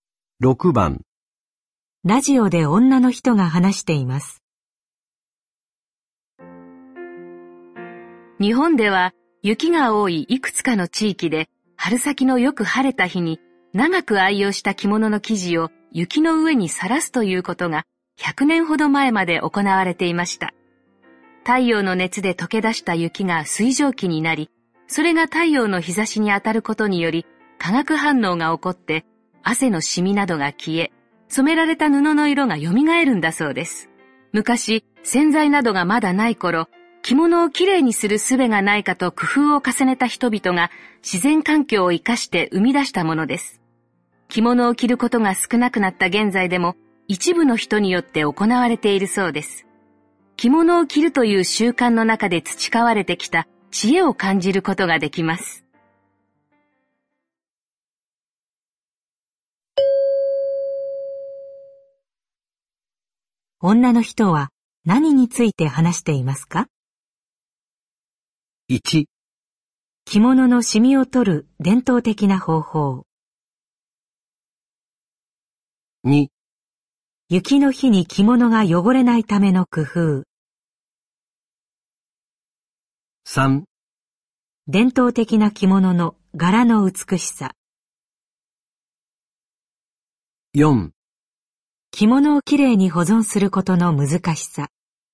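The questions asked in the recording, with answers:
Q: 女の人は何について話していますか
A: 1: 着物のシミを取る伝統的な方法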